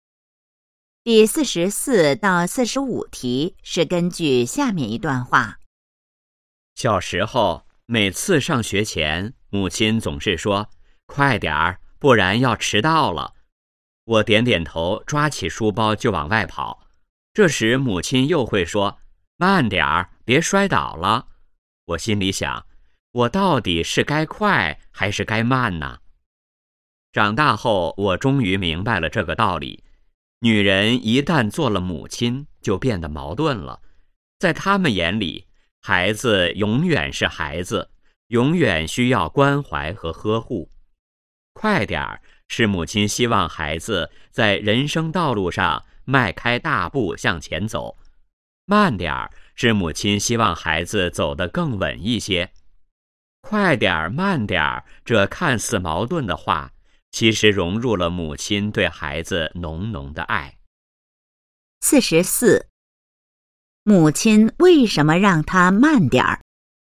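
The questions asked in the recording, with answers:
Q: 母亲为什么让他慢点儿?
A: 怕他摔倒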